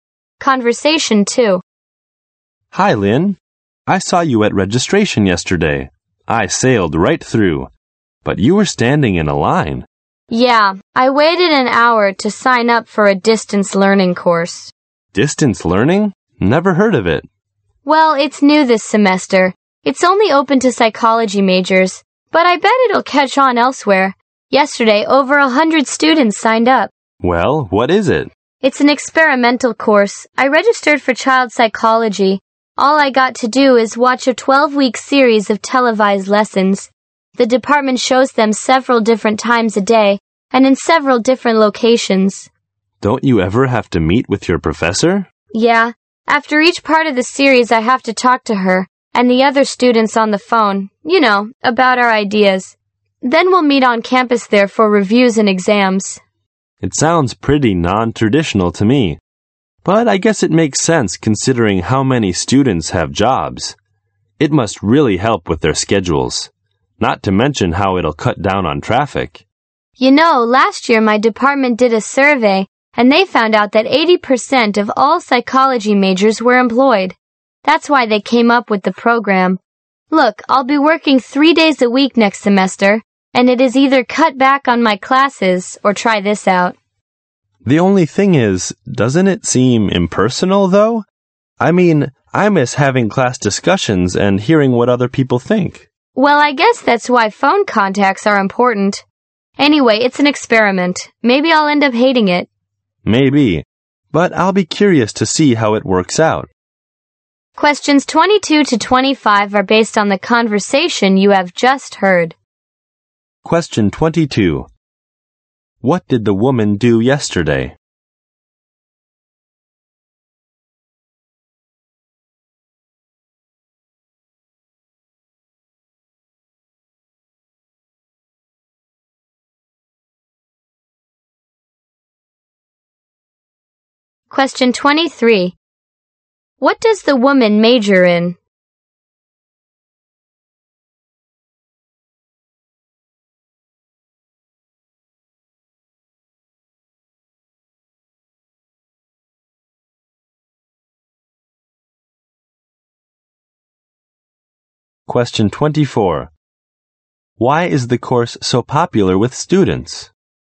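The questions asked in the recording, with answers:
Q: What did the woman do yesterday?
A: She signed up for a distance learning course.

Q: What does the woman major in?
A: Psychology.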